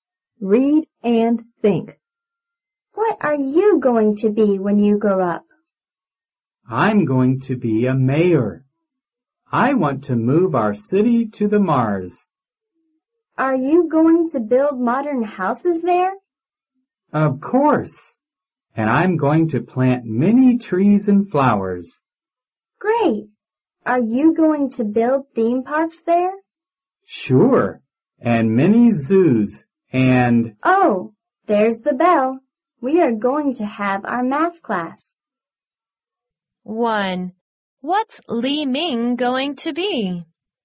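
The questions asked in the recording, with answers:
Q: What's Li Ming going to be?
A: A mayor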